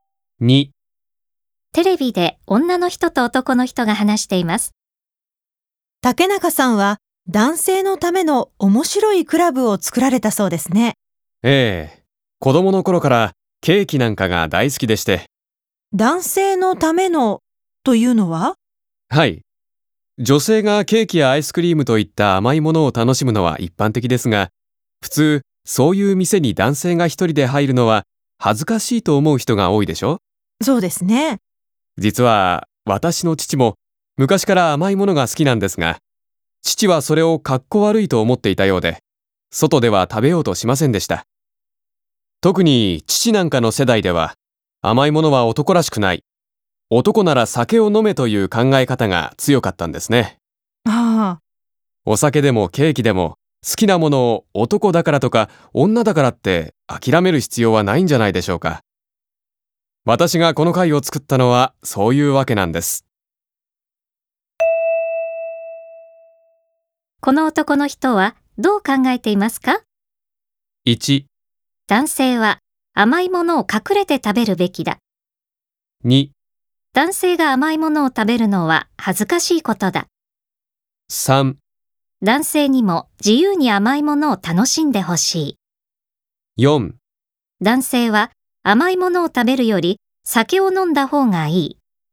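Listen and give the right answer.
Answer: 3: 男性にも自由に甘いものを楽しんでほしい。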